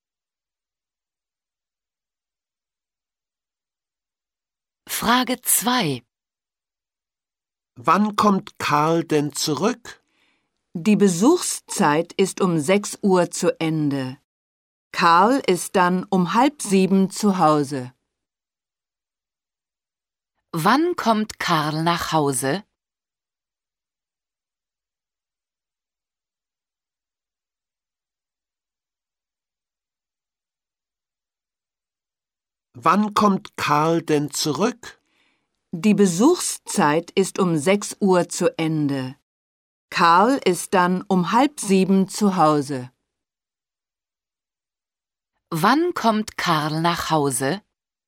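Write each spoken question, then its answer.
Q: Wann kommt Karl nach Hause?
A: Um 6:30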